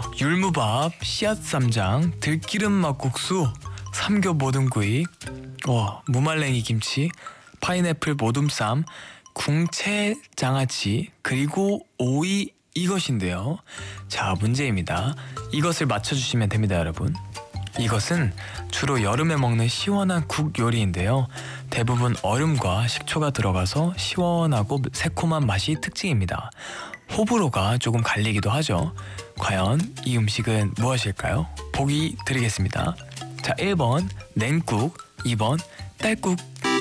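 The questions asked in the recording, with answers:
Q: 과연 이 음식은 무엇일까요?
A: 1번: 냉국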